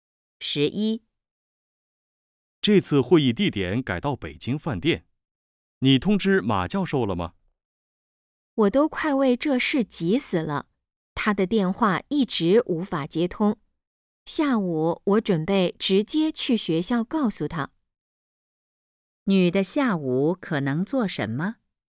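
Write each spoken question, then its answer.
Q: 女的下午可能做什么?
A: 去学校通知马教授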